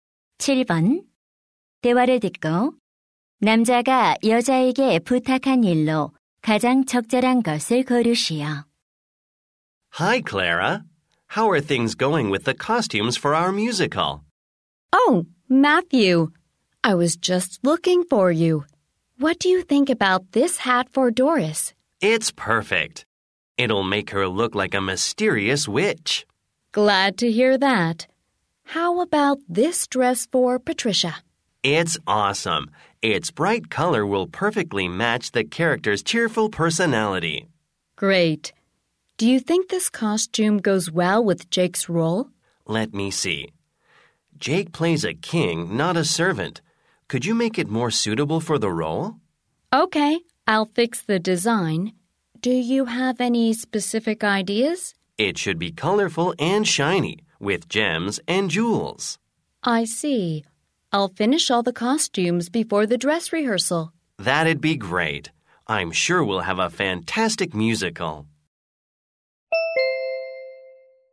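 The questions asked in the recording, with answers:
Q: 대화를 듣고 남자가 여자에게 부탁한 일로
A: Jake의 왕 역할 의상 디자인 수정하기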